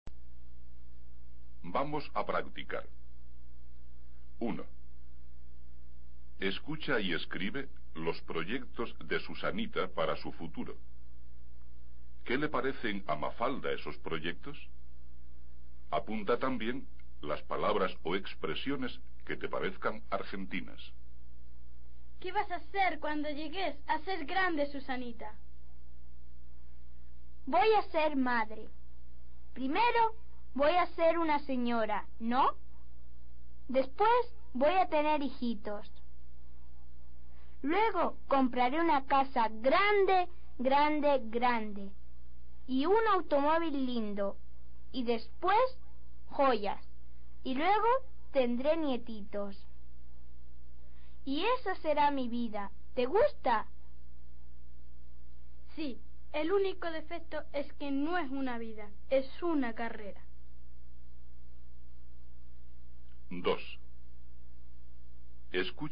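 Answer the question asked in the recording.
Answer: Dice que no es una vida, es una carrera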